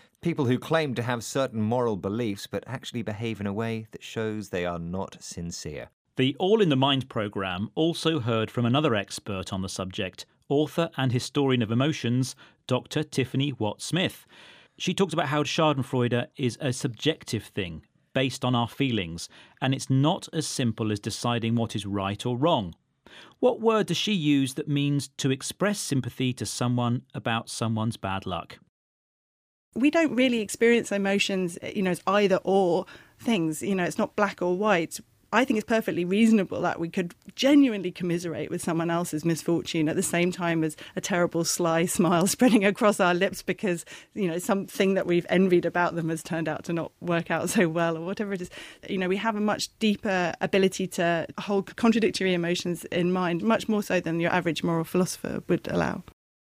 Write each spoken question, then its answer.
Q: What word does she use that means to express sympathy to someone about someone's bad luck?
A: She says when something goes wrong for someone, we have the ability to commiserate with them.